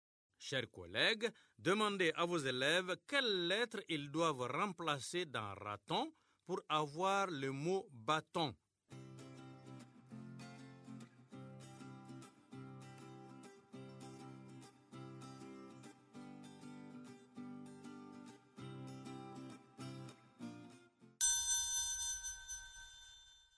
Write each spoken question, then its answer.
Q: Chers collègues, demandez à vos élèves quelles lettres ils doivent remplacer dans raton pour avoir le mot bâton.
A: Dans raton, on remplace la lettre R par la lettre B pour avoir bâton.